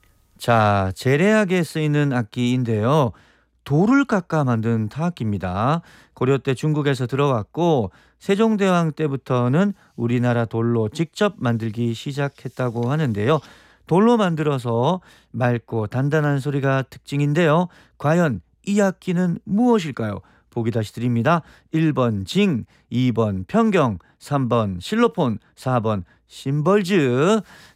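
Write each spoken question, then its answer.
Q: 과연 이 악기는 무엇일까요?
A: 2: 평경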